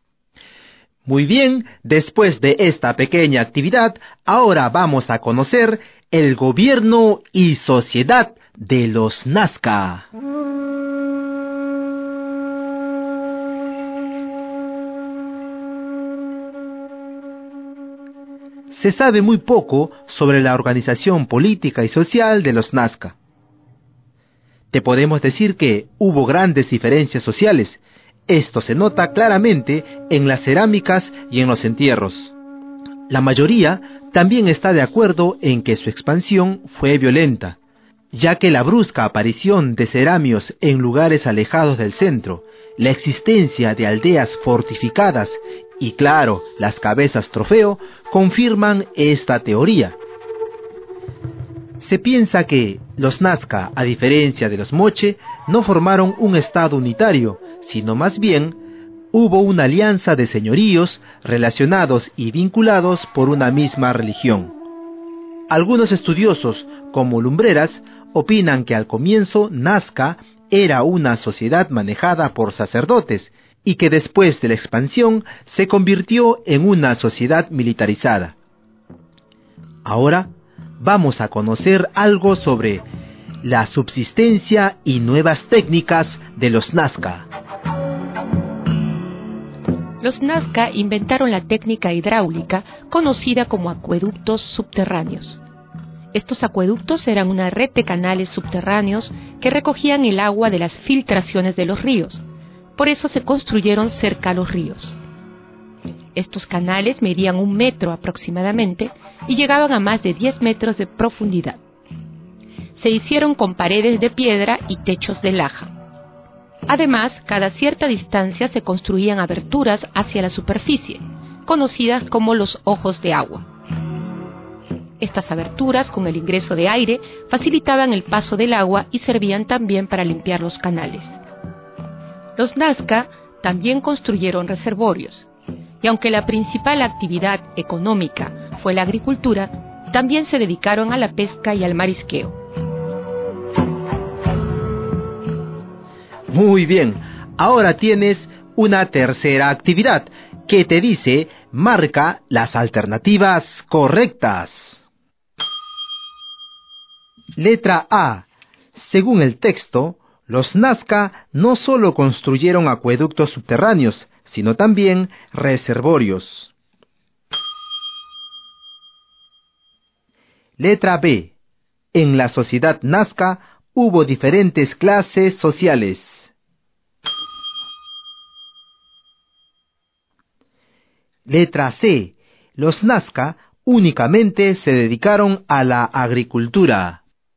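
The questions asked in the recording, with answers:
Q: Según el texto, los Nazca no solo construyeron acueductos subterráneos, sino también reservorios.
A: Correcta

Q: En la sociedad Nazca hubo diferentes clases sociales.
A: Correcta

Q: Los Nazca únicamente se dedicaron a la agricultura.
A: Incorrecta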